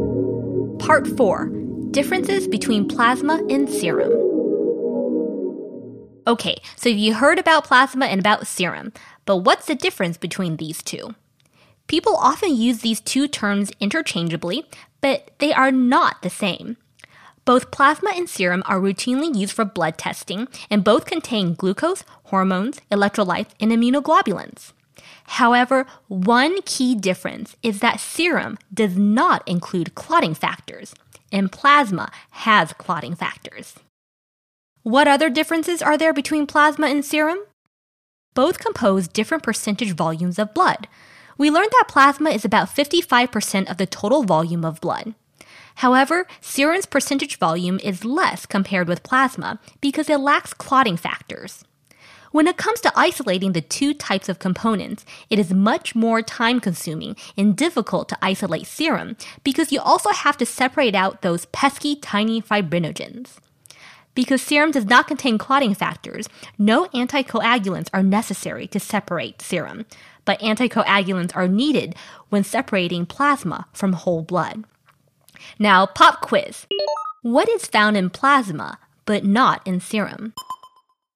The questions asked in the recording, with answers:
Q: What is found in plasma, but not in serum?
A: The answer is clotting factors.